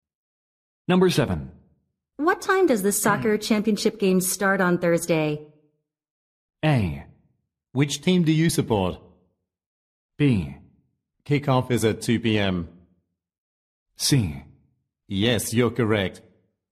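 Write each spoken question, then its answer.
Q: What time does the soccer championship game start on Thursday?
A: B: Kickoff is at 2 p.m.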